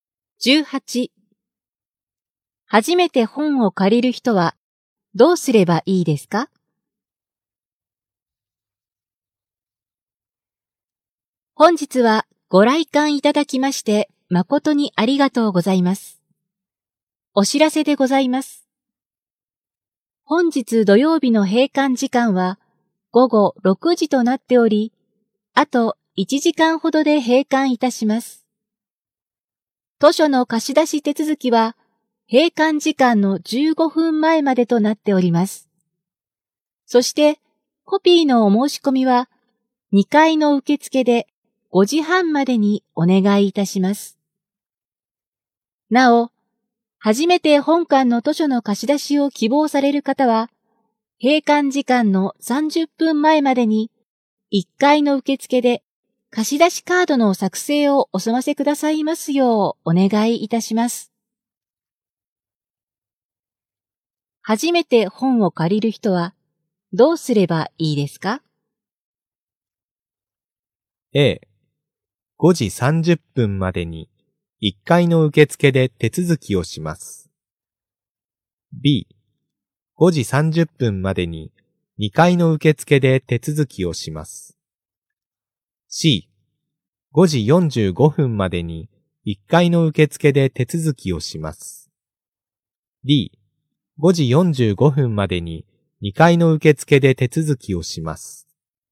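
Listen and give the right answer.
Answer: A: 5時30分までに1階の受付で手続きをします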